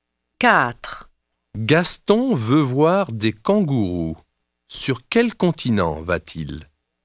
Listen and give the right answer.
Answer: Il va en Australie.